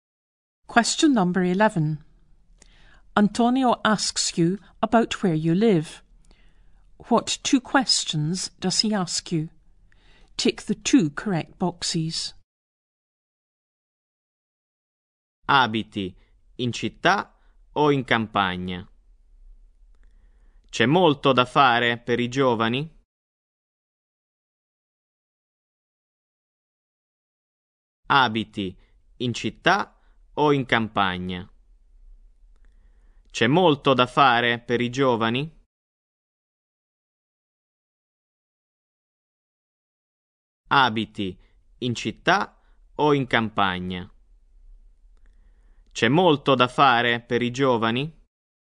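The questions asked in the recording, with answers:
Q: What two questions does he ask you?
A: Do you live in the town or the country? Is there a lot for young people to do?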